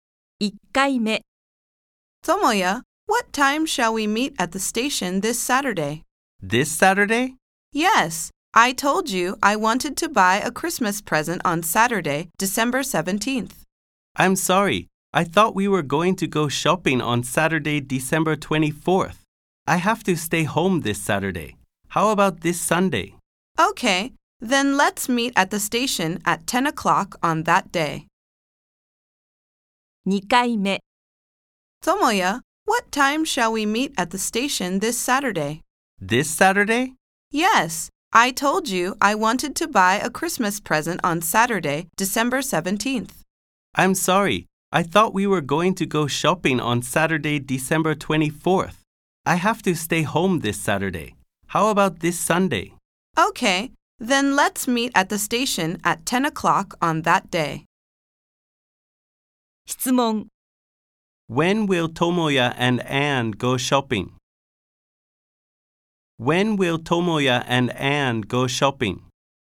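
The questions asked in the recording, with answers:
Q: When will Tomoya and Anne go shopping?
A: This Sunday (December 18th)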